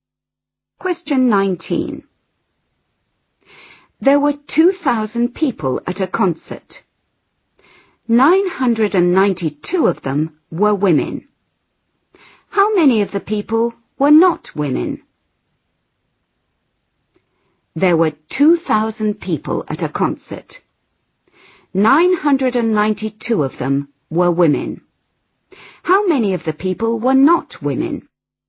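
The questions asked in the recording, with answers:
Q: How many of the people were not women?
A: 1008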